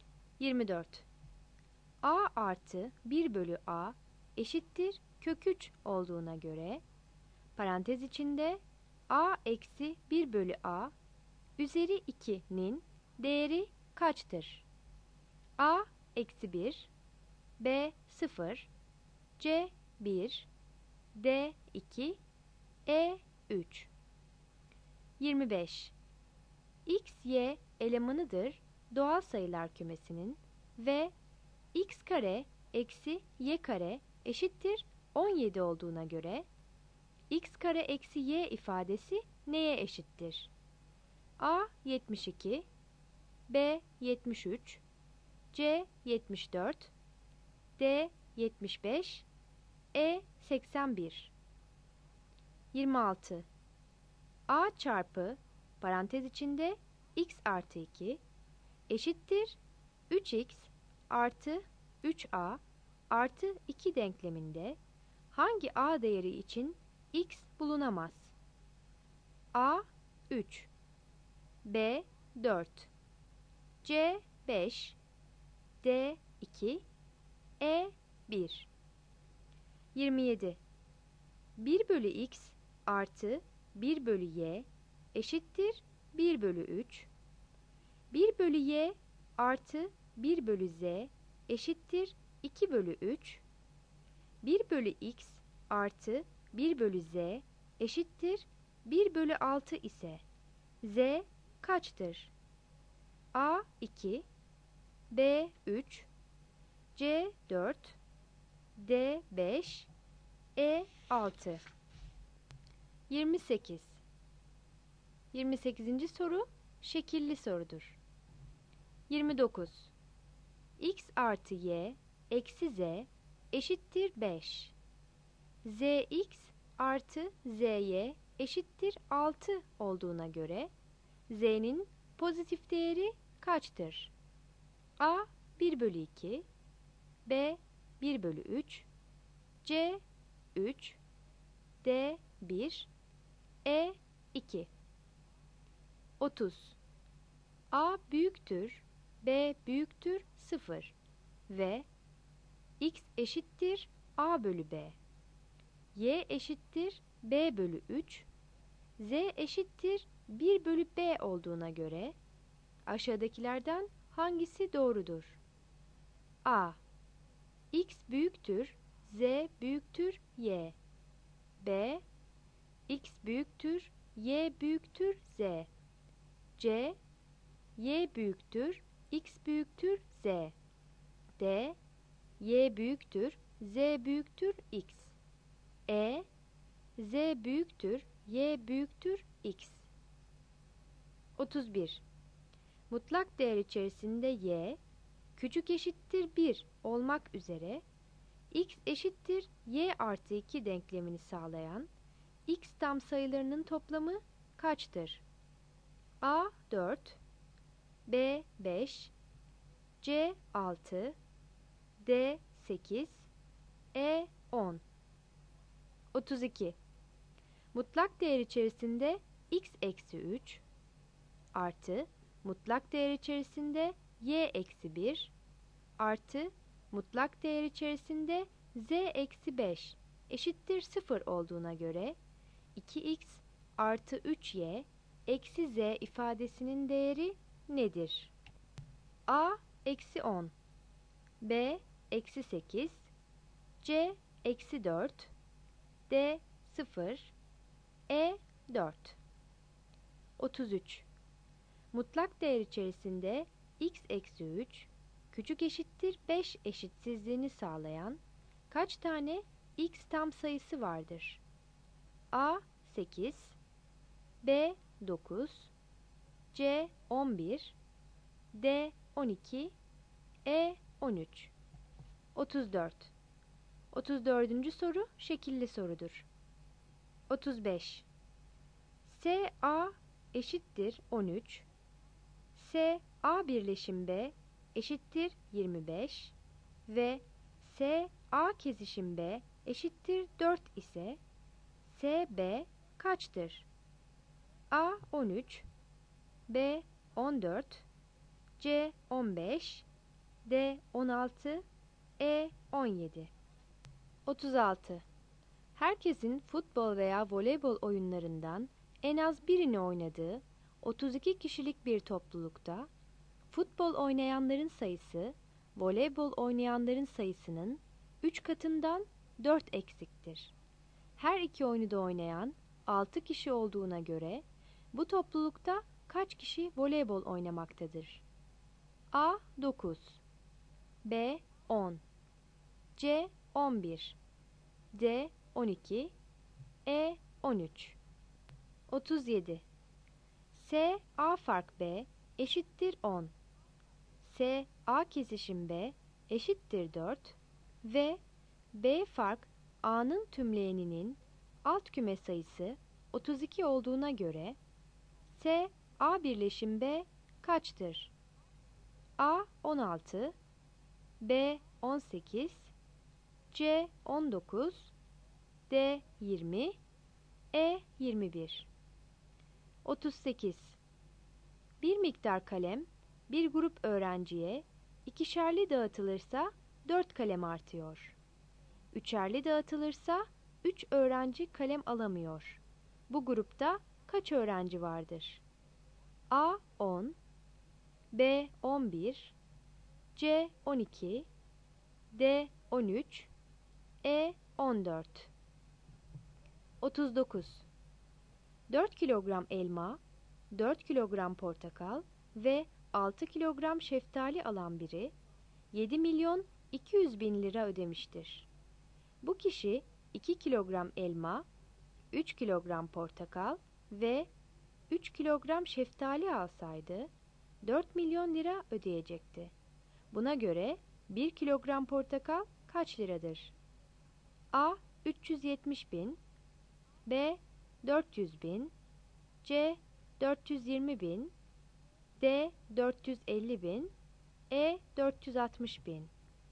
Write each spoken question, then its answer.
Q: A artı 1 bölü A eşittir kök 3 olduğuna göre parantez içinde A eksi 1 bölü A üzeri 2'nin değeri kaçtır?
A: 24 A

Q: Mutlak değer içerisinde y küçük eşittir 1 olmak üzere x eşittir y artı 2 denklemini sağlayan x tam sayılarının toplamı kaçtır?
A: 31 C

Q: Mutlak değer içerisinde x eksi 3 artı mutlak değer içerisinde y eksi 1 artı mutlak değer içerisinde z eksi 5 eşittir 0 olduğuna göre 2x artı 3y eksi z ifadesinin değeri nedir?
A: 32 E

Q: Mutlak değer içerisinde x eksi 3 küçük eşittir 5 eşitsizliğini sağlayan kaç tane x tam sayısı vardır?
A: 33 C

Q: S A eşittir 13. S A birleşim B eşittir 25 ve S A kesişim B eşittir 4 ise S B kaçtır?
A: 35 D

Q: Bu grupta kaç öğrenci vardır?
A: 38 D

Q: Buna göre 1 kilogram portakal kaç liradır?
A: 39 B